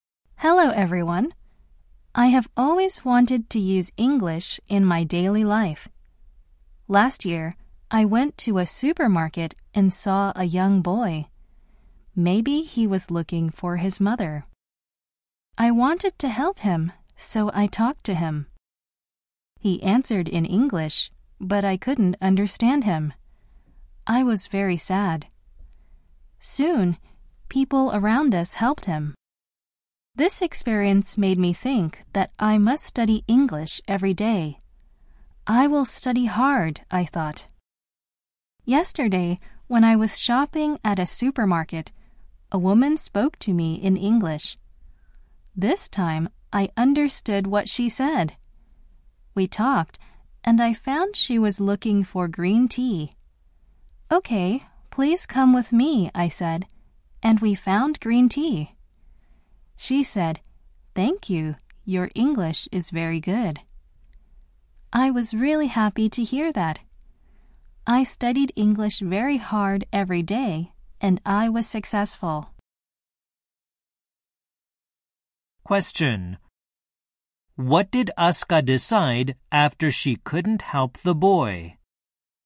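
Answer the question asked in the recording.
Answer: She decided to study English hard every day.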